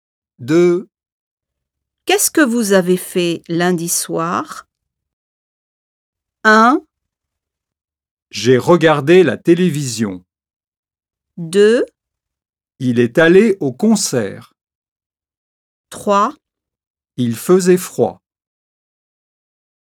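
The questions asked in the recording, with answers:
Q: Qu'est-ce que vous avez fait lundi soir?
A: 1: J'ai regardé la télévision.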